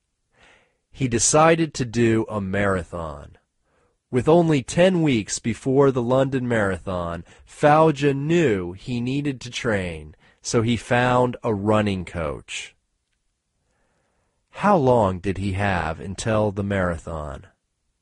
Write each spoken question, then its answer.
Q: How long did he have until the marathon?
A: He had 10 weeks before the marathon.